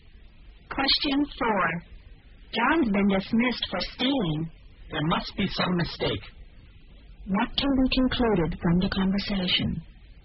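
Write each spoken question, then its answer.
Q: What can be concluded from the conversation?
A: The second speaker doesn't believe John stole anything.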